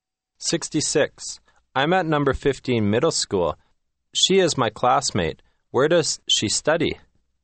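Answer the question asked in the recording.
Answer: At Number 15 Middle School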